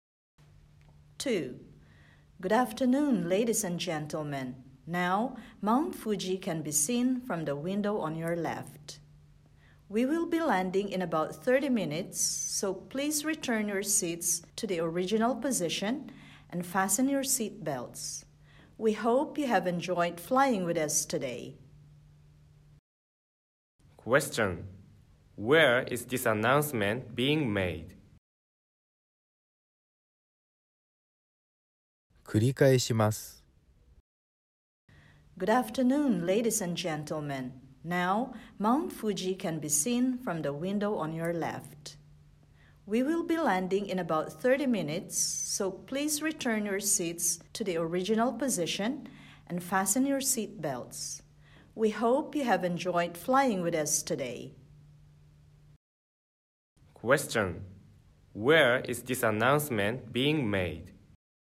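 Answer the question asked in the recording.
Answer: On an airplane.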